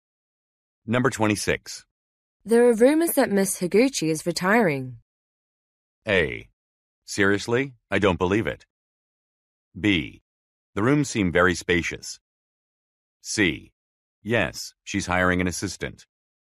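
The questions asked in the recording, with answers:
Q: There are rumors that Miss Higuchi is retiring.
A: A: Seriously? I don't believe it.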